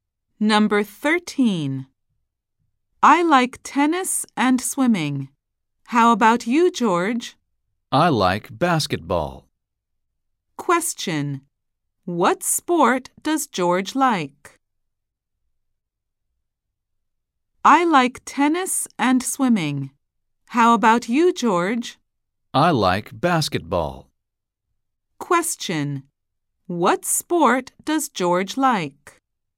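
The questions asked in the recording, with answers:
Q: What sport does George like?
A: Basketball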